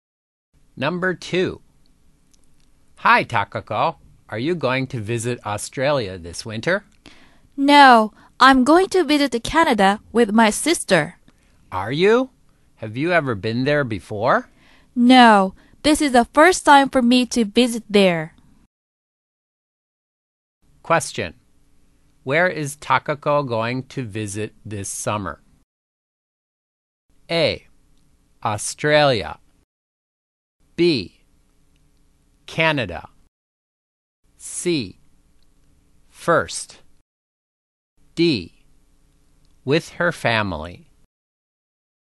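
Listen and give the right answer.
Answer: B: Canada.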